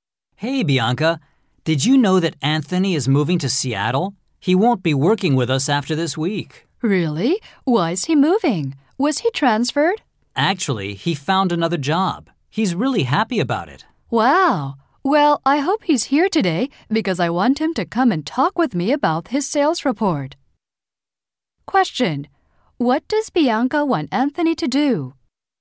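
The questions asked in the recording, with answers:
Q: What does Bianca want Anthony to do?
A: Come and talk with her about his sales report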